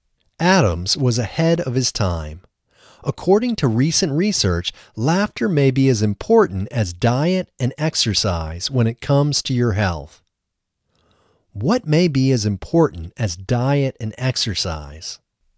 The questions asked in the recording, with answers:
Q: What may be as important as diet and exercise?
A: Laughter may be as important as diet and exercise.